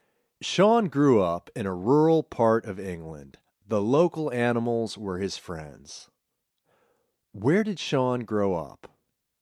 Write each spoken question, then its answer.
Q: Where did Sean grow up?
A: He grew up in a rural part of England.